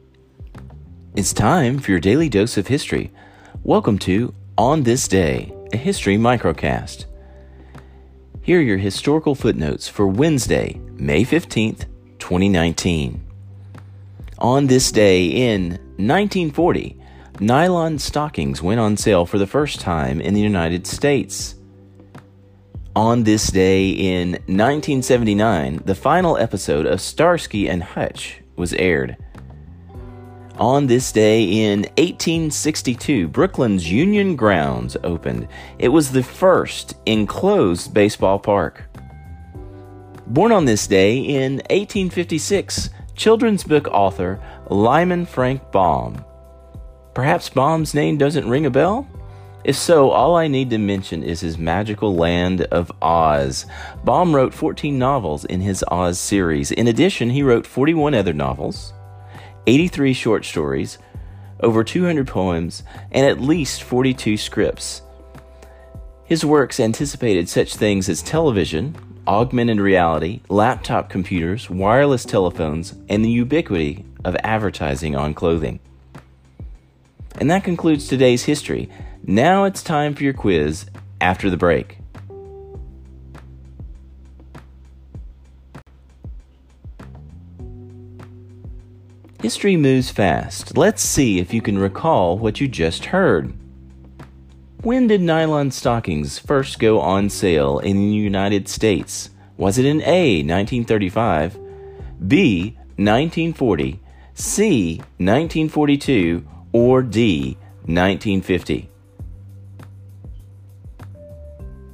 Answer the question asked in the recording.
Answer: Answer, A, 1940.